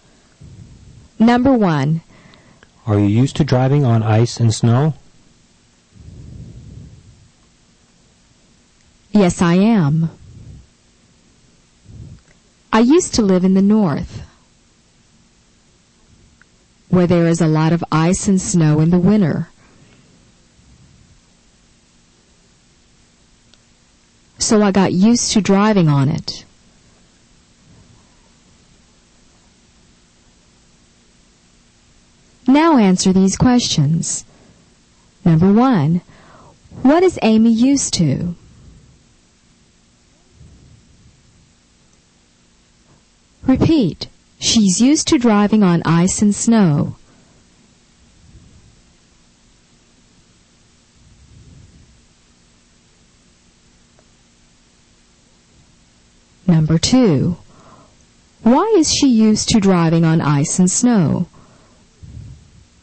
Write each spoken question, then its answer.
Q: What is Amy used to?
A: She's used to driving on ice and snow.

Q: Why is she used to driving on ice and snow?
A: Because she used to live in the north,